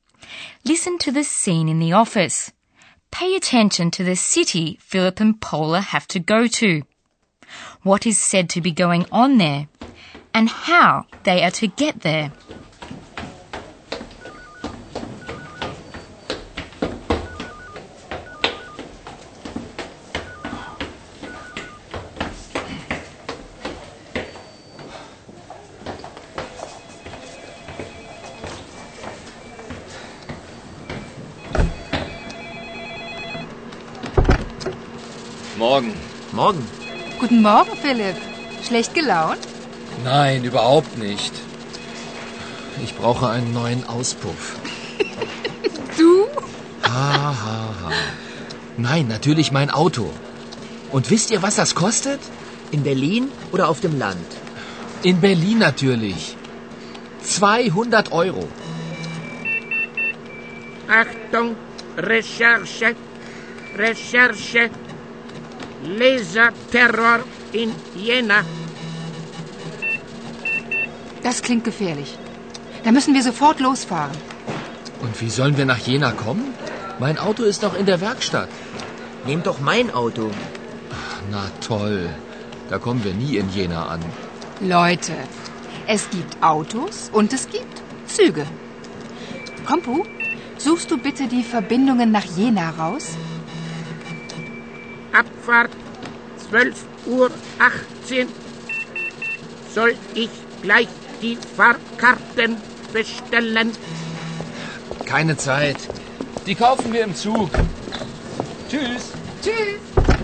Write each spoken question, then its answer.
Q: Pay attention to the city Philip and Paula have to go to, what is said to be going on there, and how they are to get there.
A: Philip and Paula have to go to Jena.